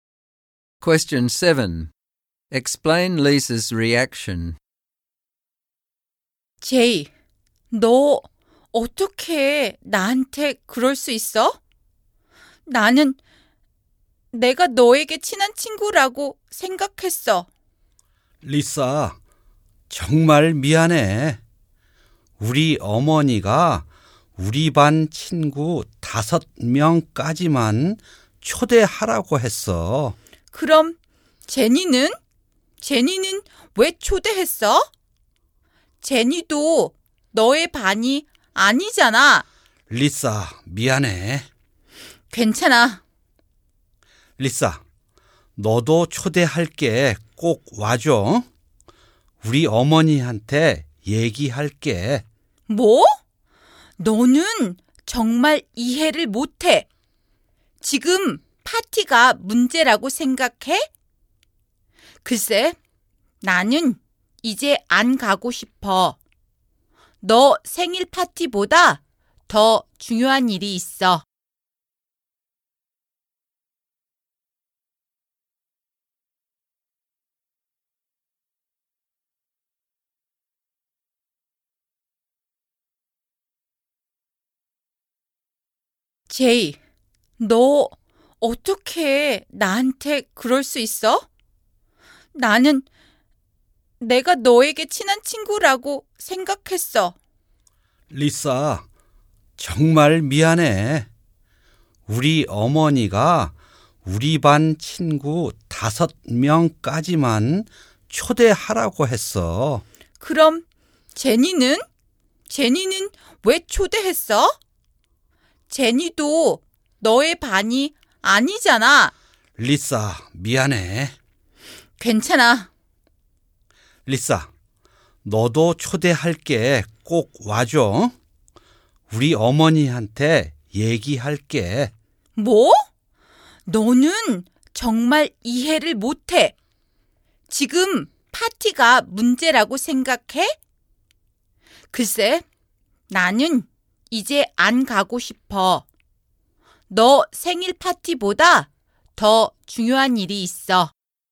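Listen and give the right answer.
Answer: She is hurt and angry because Jay did not invite her to his birthday party, though he invited Jenny, who is not in his class either; she feels betrayed as a close friend, so she refuses his late invitation because the friendship matters more than the party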